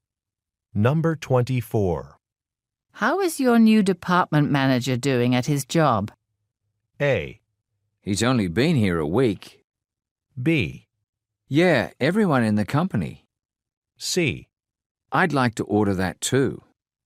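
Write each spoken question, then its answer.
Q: How is your new department manager doing at his job?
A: A: He's only been here a week.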